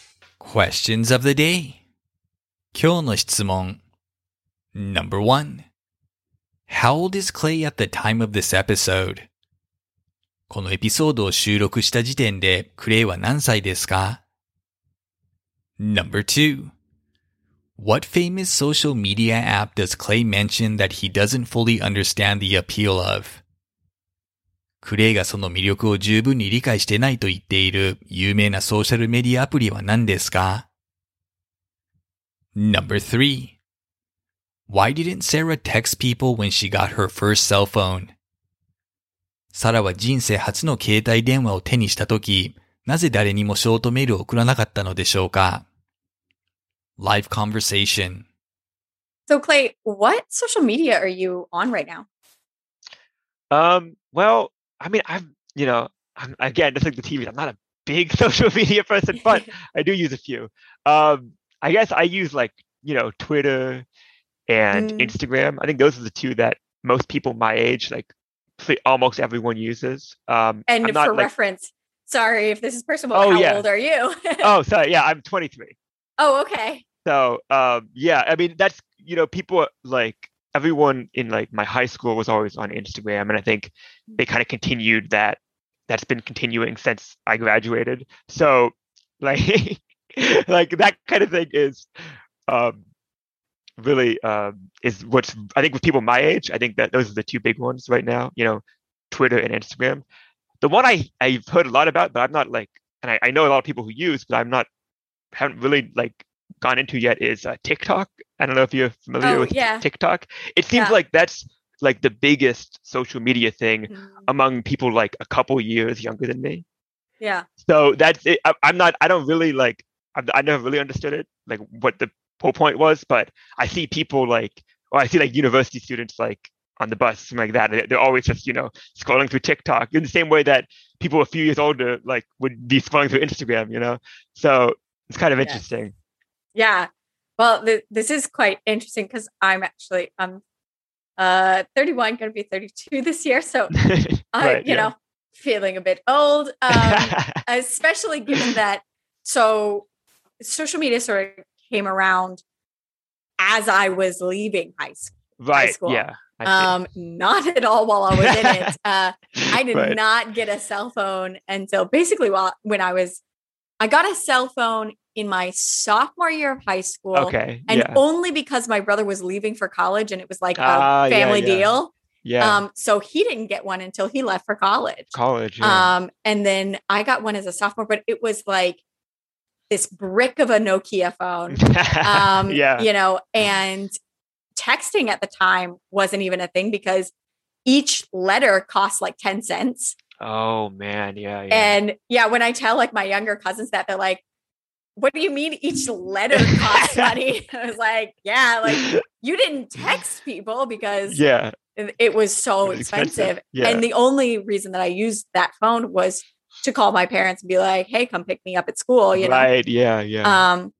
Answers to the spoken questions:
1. Clay says he is 23 years old.
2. He doesn't understand exactly what the appeal of TikTok is, despite its popularity.
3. Back then, texting cost 10 cents per letter, and so was very expensive.